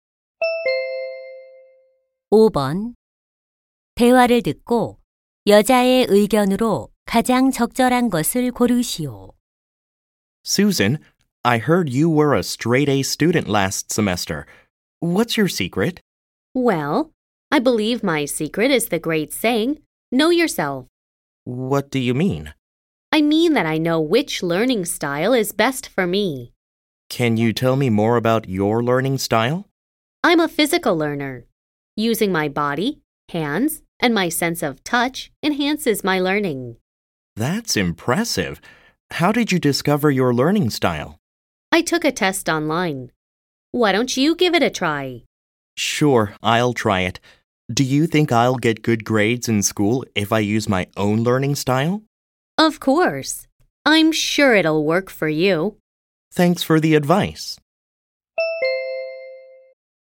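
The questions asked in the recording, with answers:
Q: 대화를듣고여자의의견으로가장적절한것을고르시오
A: 자신에게 맞는 학습 방식을 알면 공부에 도움이 된다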